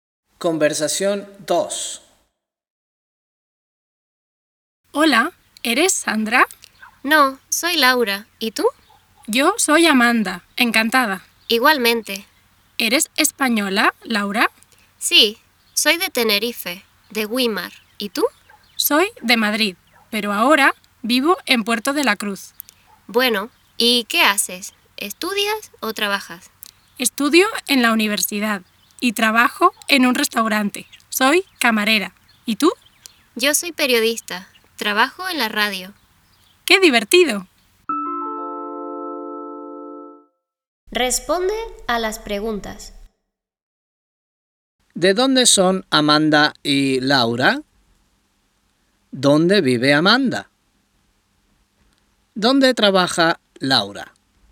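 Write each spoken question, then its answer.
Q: ¿De dónde son Amanda y Laura?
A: Amanda es de Madrid y Laura es de Tenerife (Güímar)

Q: ¿Dónde vive Amanda?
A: En Puerto de la Cruz

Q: ¿Dónde trabaja Laura?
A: En un restaurante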